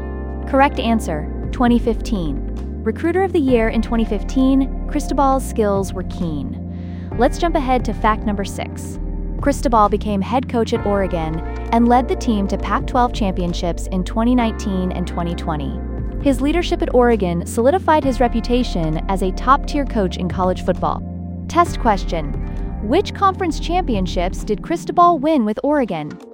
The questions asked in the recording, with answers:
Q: which conference championships did Cristobal win with Oregon?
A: Pac-12 championships.